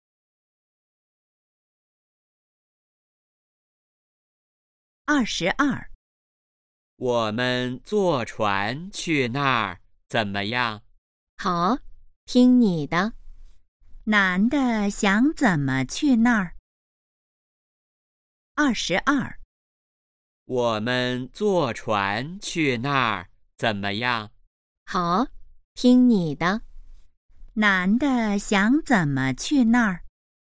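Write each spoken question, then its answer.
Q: 男的想怎么去那儿?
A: 坐船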